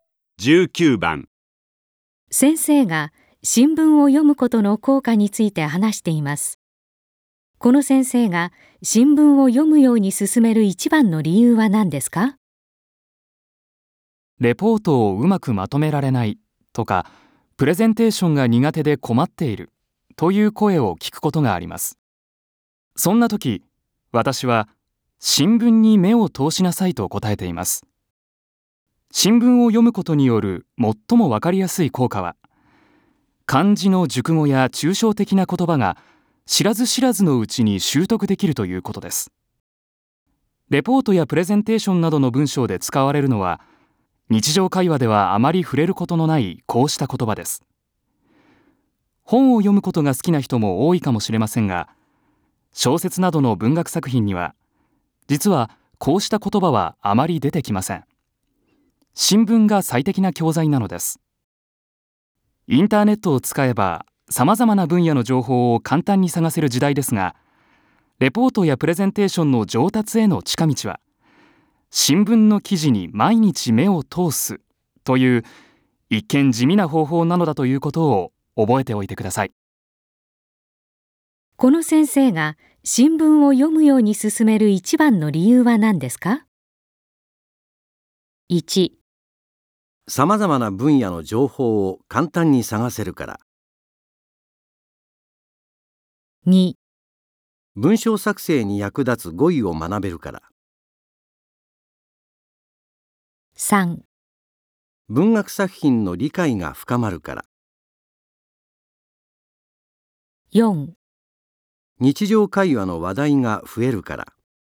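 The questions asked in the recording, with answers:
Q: この先生が新聞を読むように進める一番の理由は何ですか?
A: 2: 文章作成に役立つ語彙を学べるから。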